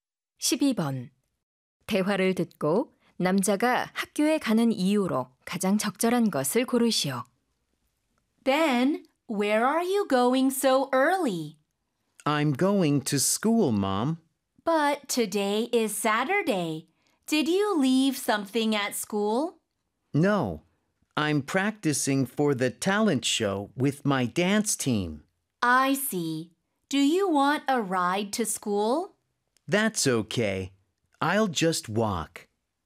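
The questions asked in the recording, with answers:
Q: 대화를 듣고 남자가 학교에 가는 이유로 가장 적절한 것을 고르시오.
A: 댄스팀과 장기자랑 연습을 하기 위해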